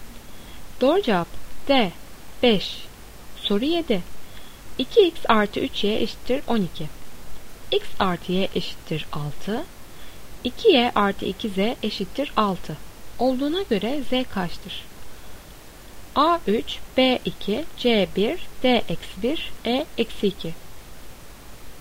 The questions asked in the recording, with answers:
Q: 2y artı 2z eşittir 6 olduğuna göre z kaçtır?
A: Doğru cevap A 3.